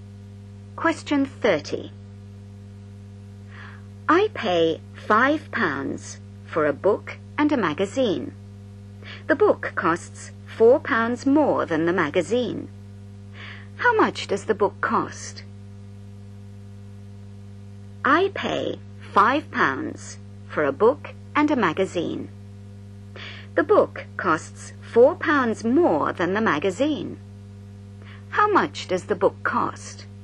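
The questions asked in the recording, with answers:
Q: How much does the book cost?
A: £4.50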